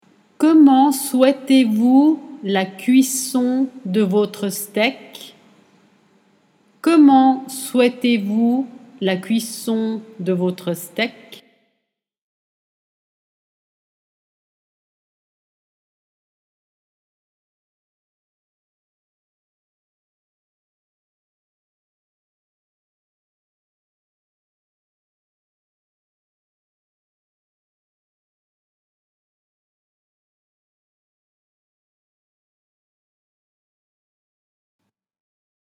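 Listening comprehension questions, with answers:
Comment steak ?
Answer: souhaitez-vous la cuisson de votre

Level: Dettato di francese A2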